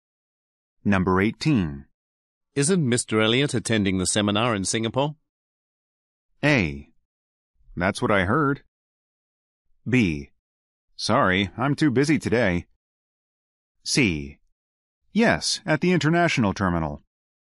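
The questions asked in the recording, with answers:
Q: Isn't Mr. Elliot attending the seminar in Singapore?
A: A: That's what I heard.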